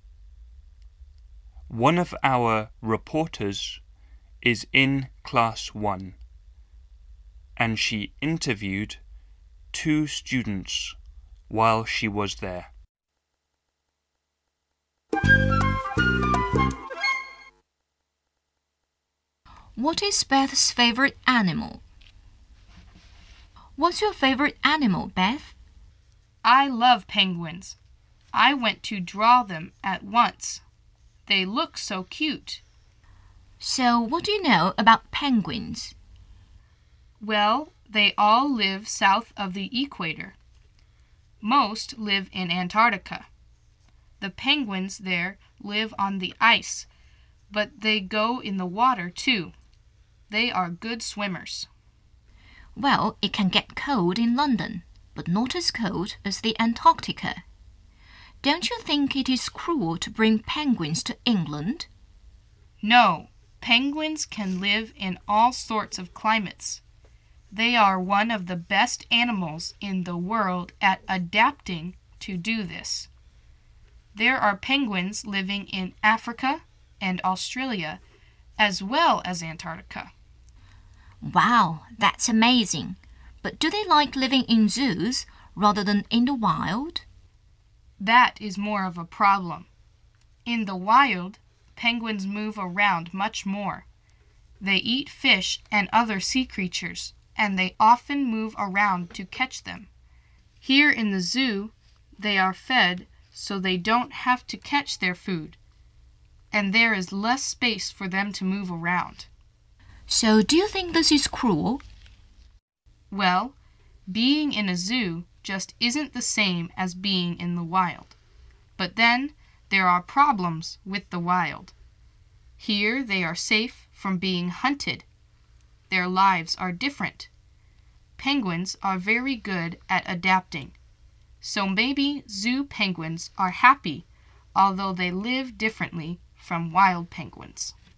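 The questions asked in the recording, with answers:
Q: What is Beth's favorite animal?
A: Penguins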